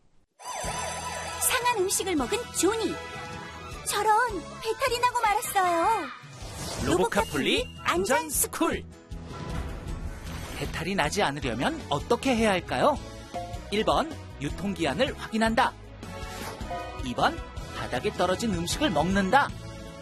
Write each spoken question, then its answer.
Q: 배탈이 나지 않으려면 어떻게 해야 할까요?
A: 정답은 1번. 음식을 먹기 전에는 유통기한을 꼭 확인해야 해요.